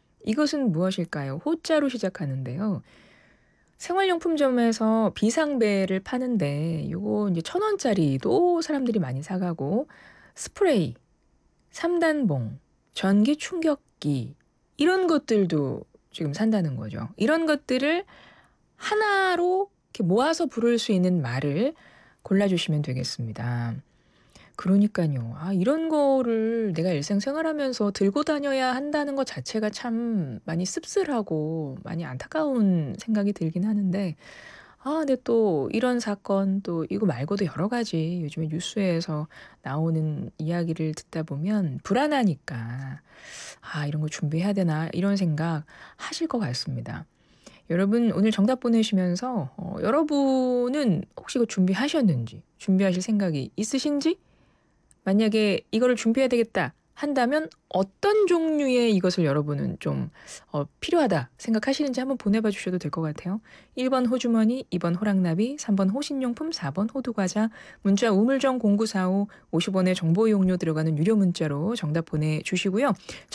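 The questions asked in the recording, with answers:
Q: 이런 것들을 하나로 이렇게 모아서 부를 수 있는 말을 골라주시면 되겠습니다.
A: 3번: 호신용품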